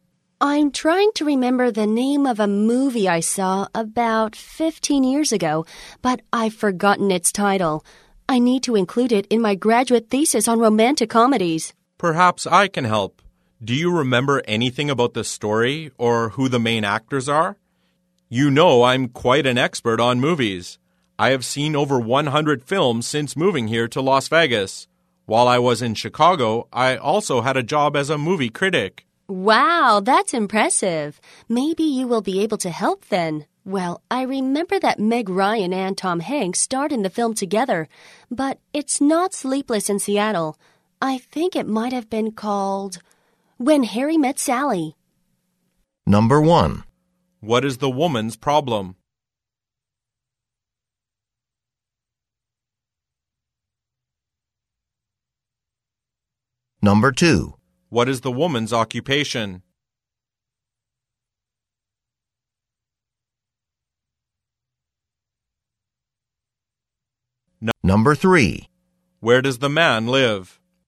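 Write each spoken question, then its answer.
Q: What is the woman's problem?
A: She has forgotten the title of a movie she saw about 15 years ago.

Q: Where does the man live?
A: Las Vegas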